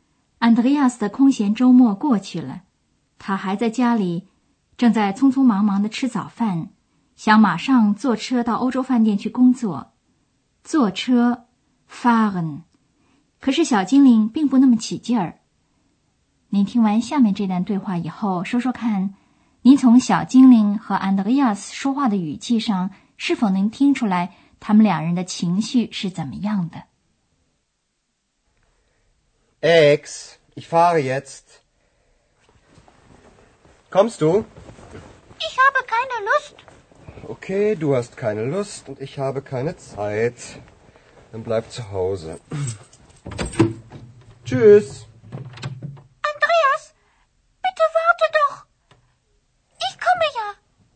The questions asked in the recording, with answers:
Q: 您从小精灵和安德烈亚斯说话的语气上,是否能听出来他们两人的情绪是怎么样的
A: 小精灵一点情绪也没有。Andreas 心里烦躁得很。